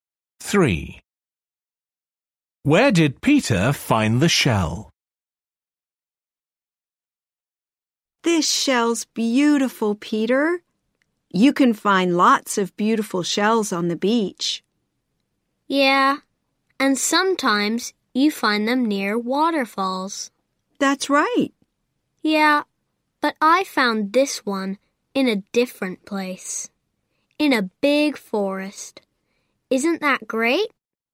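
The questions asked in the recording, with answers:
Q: Where did Peter find the shell?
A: In a big forest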